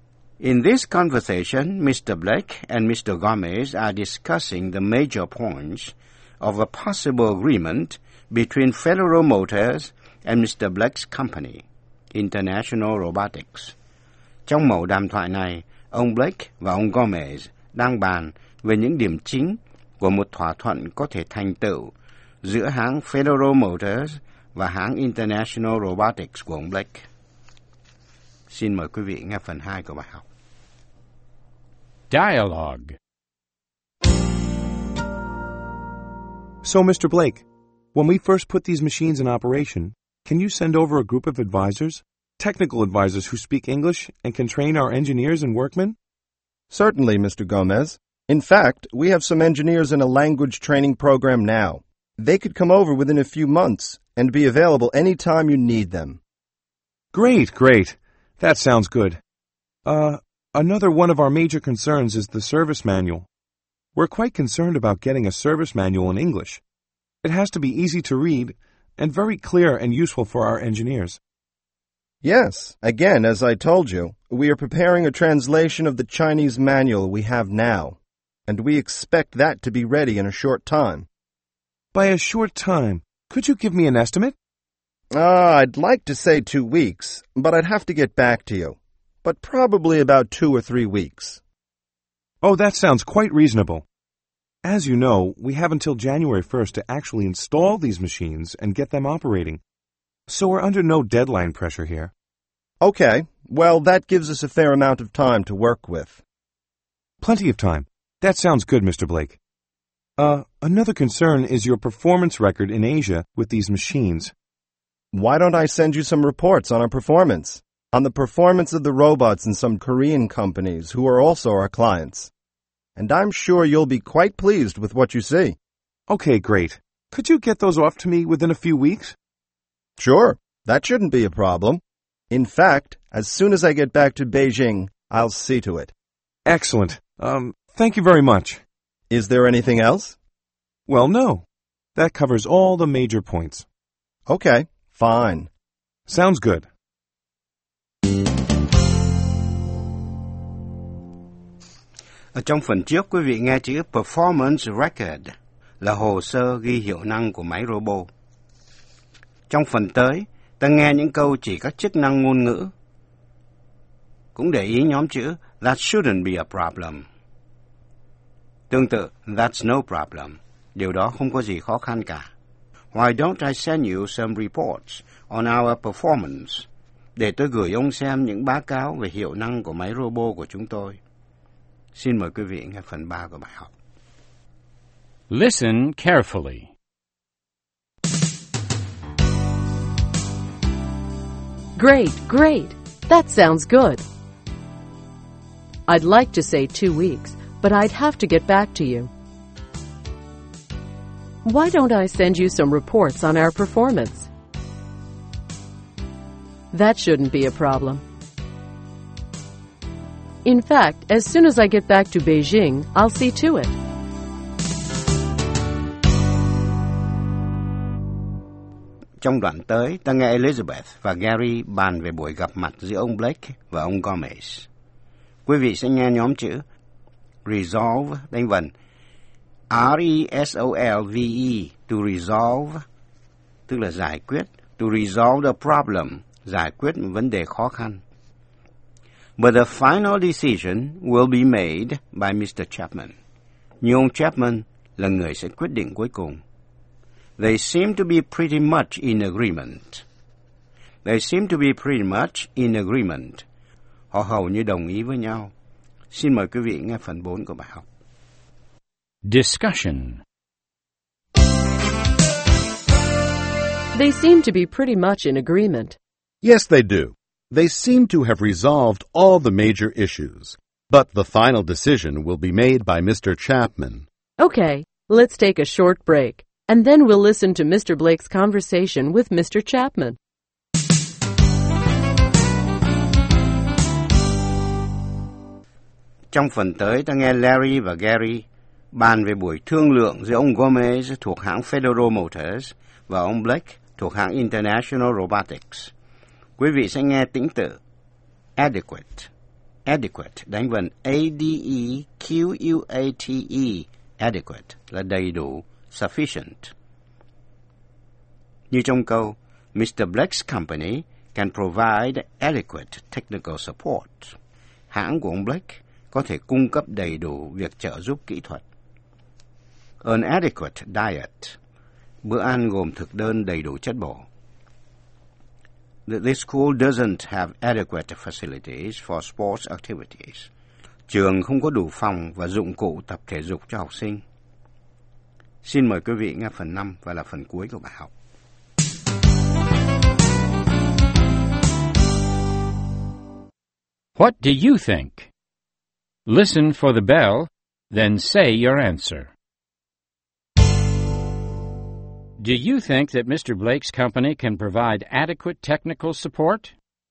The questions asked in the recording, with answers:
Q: Do you think that Mr. Blake's company can provide adequate technical support?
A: Yes, I think they can. Some of their engineers are already in a language training program to improve their English skills.